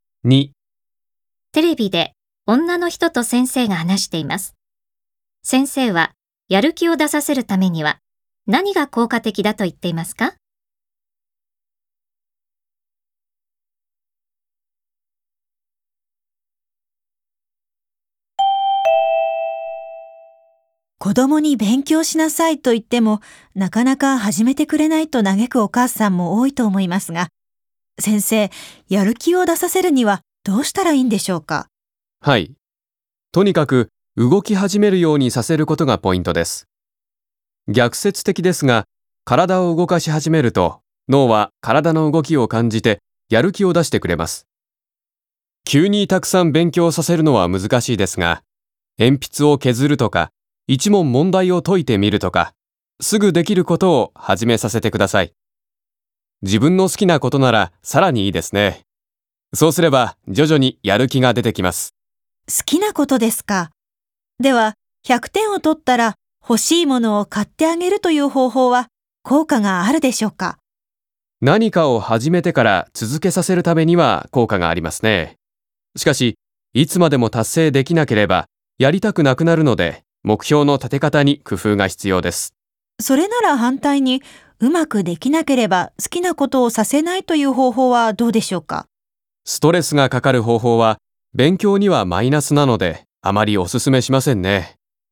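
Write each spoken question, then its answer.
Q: 先生はやる気を出させるためには何が効果的だと言っていますか?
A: すぐできることを始めさせて、体を動かし始めるようにさせること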